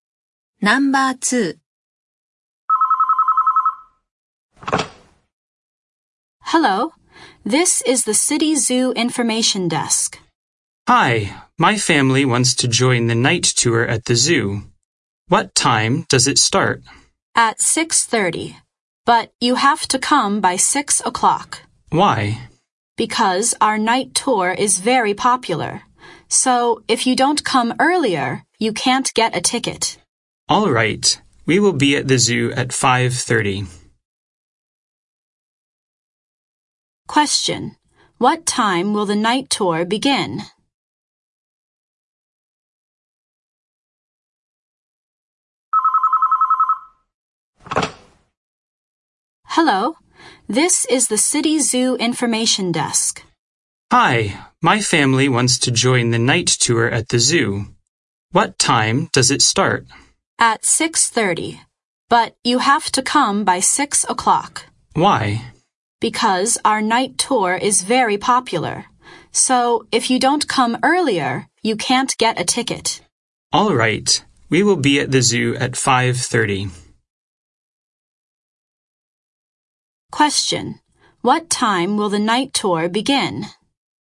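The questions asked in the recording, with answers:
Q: What time will the night tour begin?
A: At 6:30.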